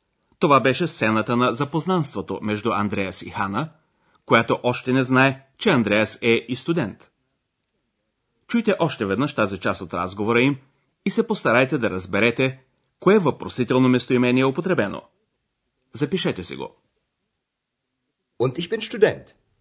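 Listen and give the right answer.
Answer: Was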